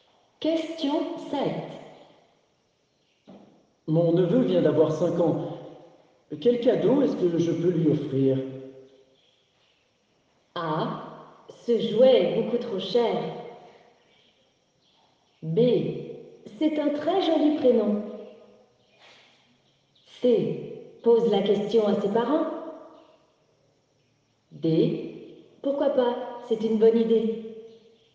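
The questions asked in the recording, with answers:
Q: Mon neveu vient d'avoir 5 ans. Quel cadeau est-ce que je peux lui offrir?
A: C: Pose la question à ses parents.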